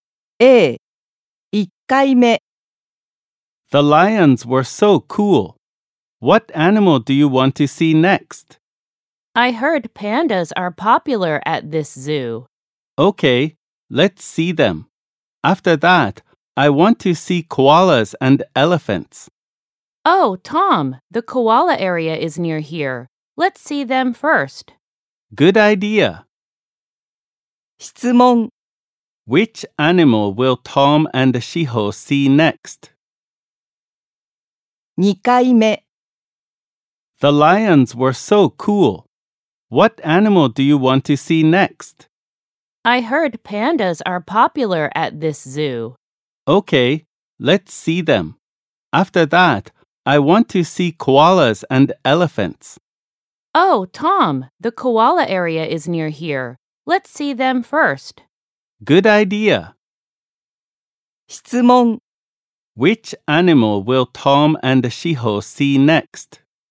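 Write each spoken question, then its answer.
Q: Which animal will Tom and Shiho see next?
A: Koalas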